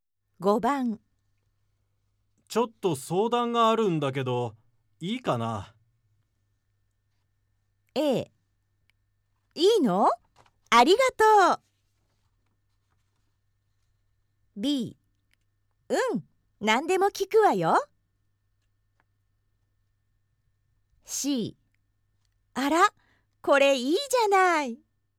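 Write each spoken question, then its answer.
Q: ちょっと相談があるんだけど、いいかな?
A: B: うん、何でも聞くわよ。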